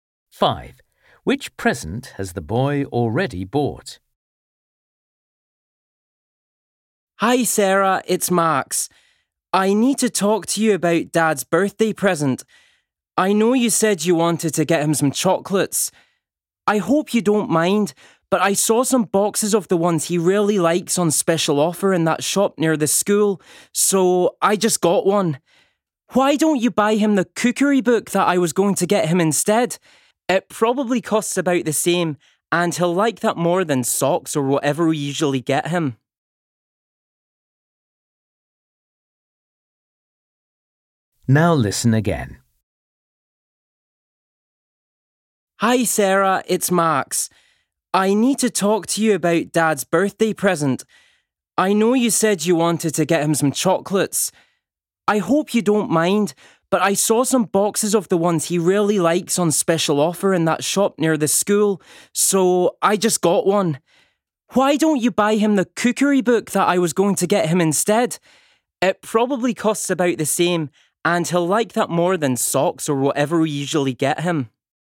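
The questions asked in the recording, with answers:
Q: Which present has the boy already bought?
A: a box of chocolates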